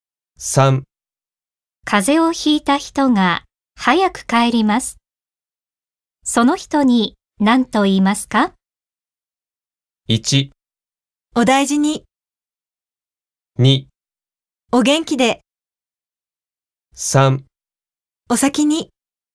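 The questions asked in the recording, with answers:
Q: 風邪をひいた人が早く帰ります。その人に何と言いますか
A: 1: お大事に。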